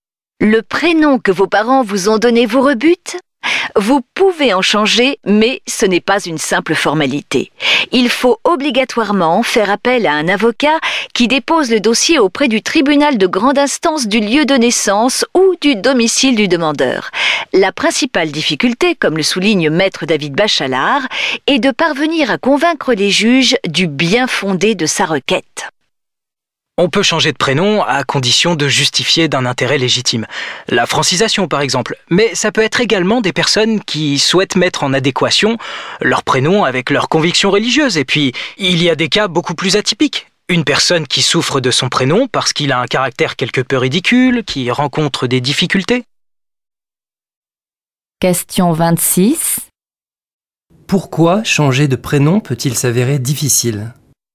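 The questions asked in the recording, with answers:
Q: Pourquoi changer de prénom peut-il s'avérer difficile ?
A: Parce qu'il faut convaincre les juges du bien-fondé de sa requête (justifier d'un intérêt légitime).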